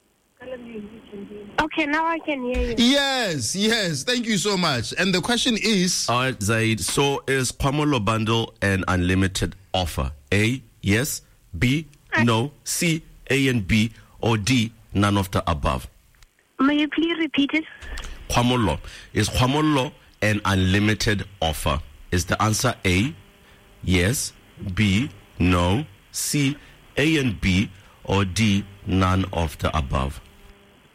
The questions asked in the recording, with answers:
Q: All right, Zaid, so is Kwamolo Bundle an unlimited offer?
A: The answer is yes.